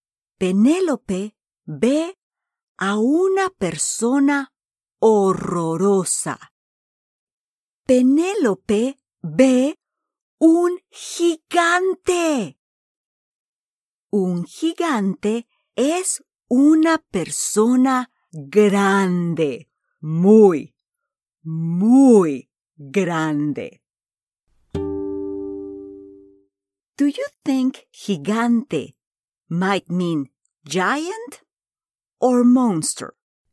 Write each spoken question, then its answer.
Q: Do you think gigante might mean giant or monster?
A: Sí, giant.